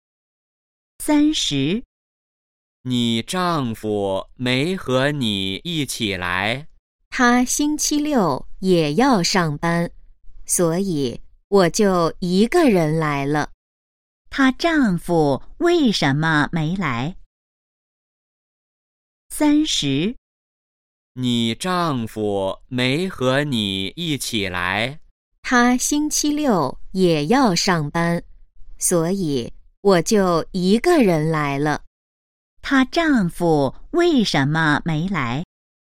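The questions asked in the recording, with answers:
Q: 她丈夫为什么没来?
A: 他星期六也要上班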